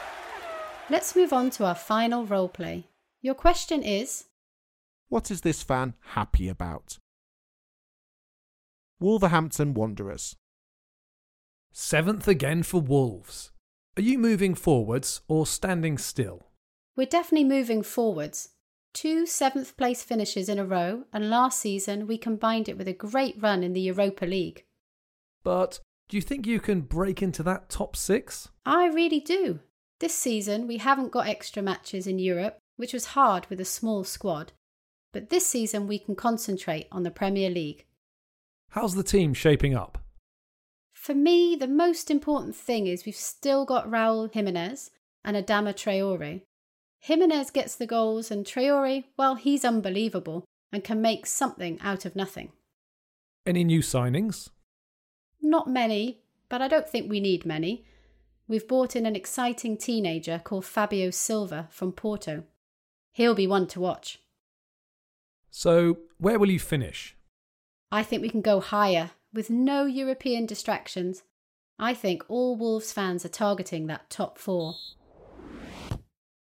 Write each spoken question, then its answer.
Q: what is this fan happy about?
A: She seemed most happy about Raul Jimenez and Adama Traore staying at the club, although she seemed happy in general, like all Wolves fans probably.